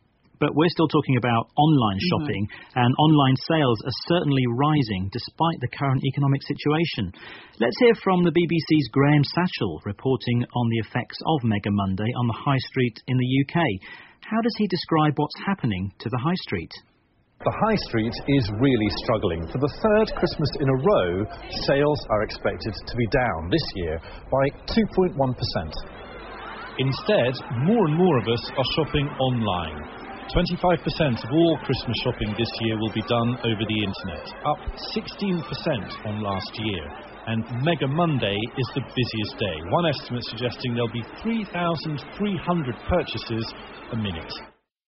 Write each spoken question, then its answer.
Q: How does he describe what's happening to the high street?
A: So, Graham Satchell says the high street is struggling.